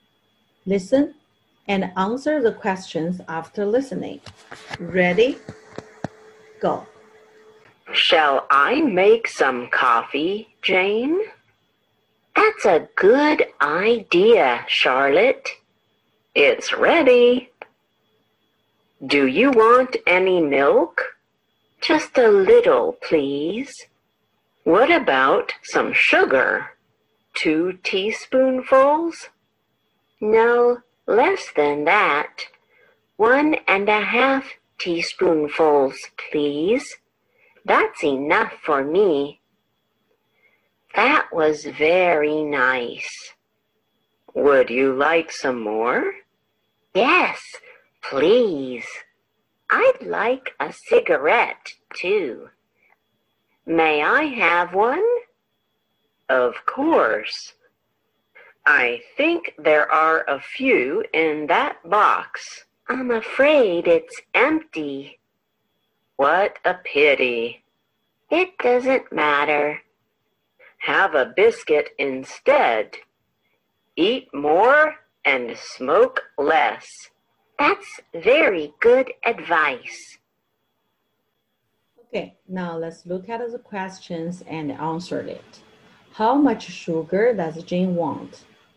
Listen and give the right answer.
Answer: 1.5 teaspoonfuls.